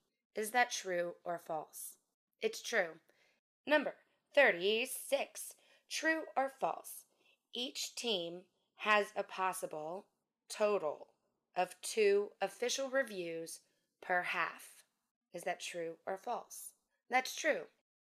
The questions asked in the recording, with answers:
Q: Each team has a possible total of 2 official reviews per half.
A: That's true.